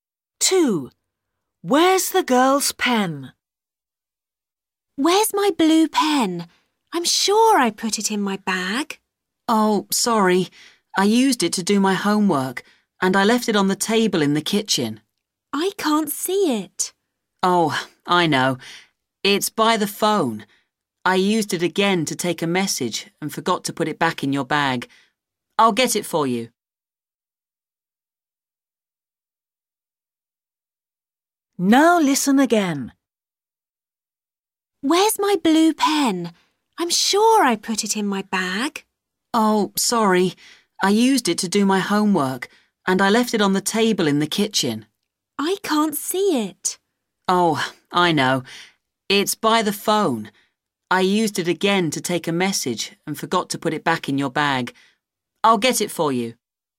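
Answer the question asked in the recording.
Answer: by the phone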